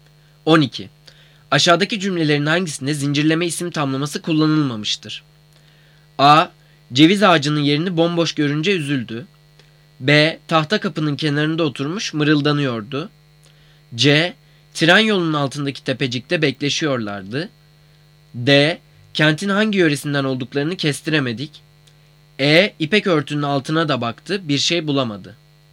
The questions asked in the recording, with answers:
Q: Aşağıdaki cümlelerin hangisinde zincirleme isim tamlaması kullanılmamıştır?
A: Cevap D. Kentin hangi yöresinden olduklarını kestiremedik.